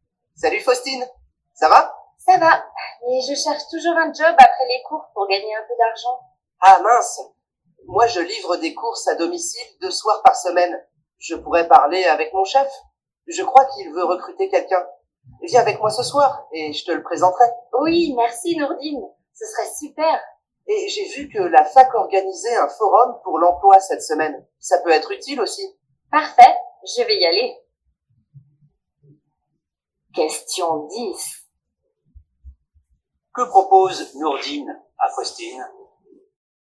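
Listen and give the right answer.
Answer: De la présenter à son chef (qui veut recruter quelqu'un pour livrer des courses)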